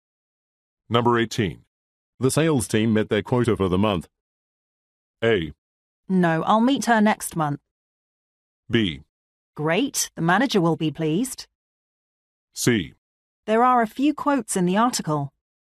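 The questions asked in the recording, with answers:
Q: The sales team met their quota for the month.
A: B: Great, the manager will be pleased.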